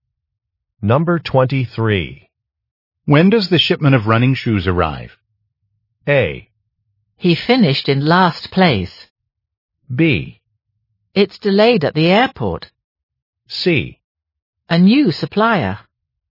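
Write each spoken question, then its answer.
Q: When does the shipment of running shoes arrive?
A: B: It's delayed at the airport.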